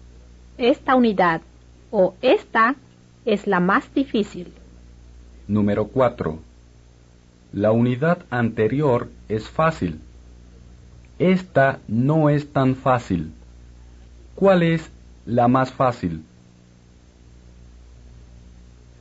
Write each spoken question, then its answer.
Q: ¿Cuál es la más fácil?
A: La unidad anterior, o la anterior, es la más fácil.